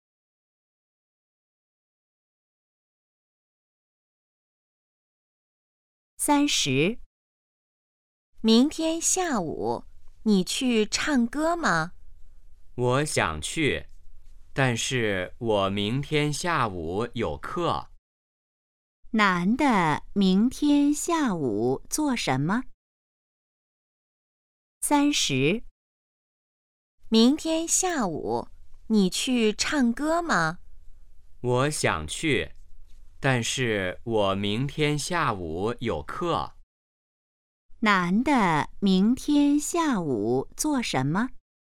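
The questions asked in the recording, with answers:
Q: 男的明天下午做什么?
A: 上课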